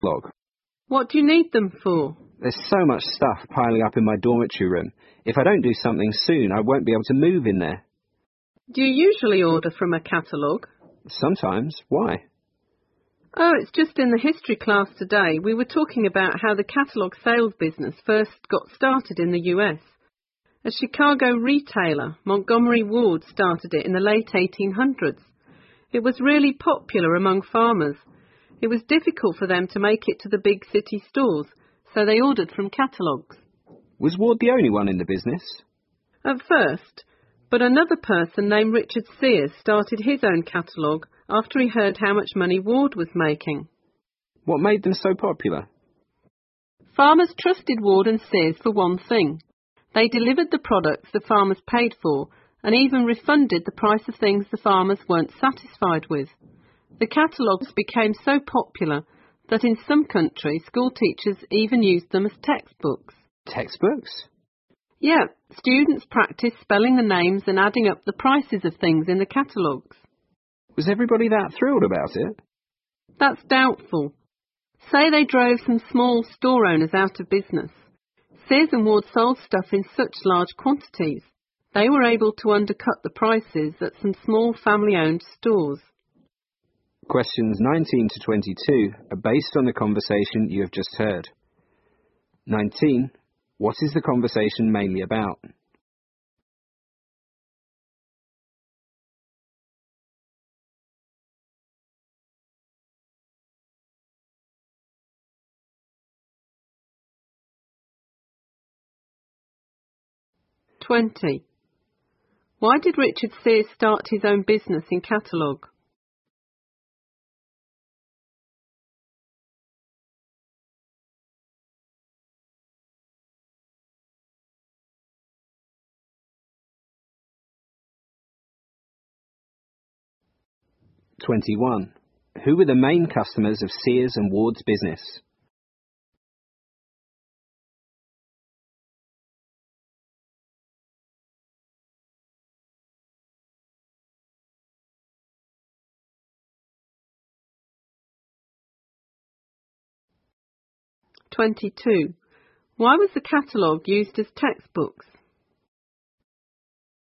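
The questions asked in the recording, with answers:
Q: What is the conversation mainly about?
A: The history of the catalogue sales business in the US

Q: Why did Richard Sears start his own business in catalogue?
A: He heard how much money Ward was making

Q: Who were the main customers of Sears and Ward's business?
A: Farmers

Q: Why was the catalogue used as textbooks?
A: Students practiced spelling the names and adding up the prices of things in them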